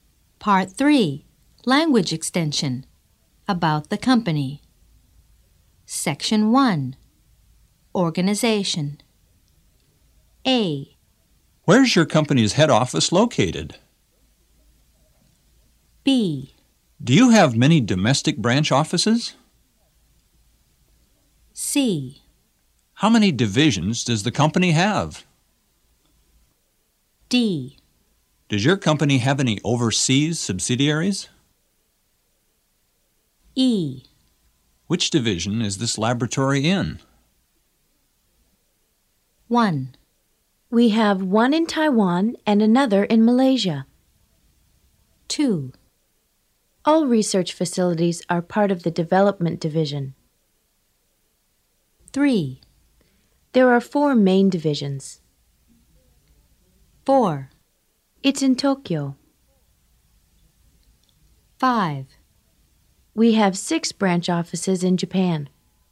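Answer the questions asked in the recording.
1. 4: It's in Tokyo.
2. 5: We have 6 branch offices in Japan.
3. 3: There are 4 main divisions.
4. 1: We have one in Taiwan and another in Malaysia.
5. 2: All research facilities are part of the development division.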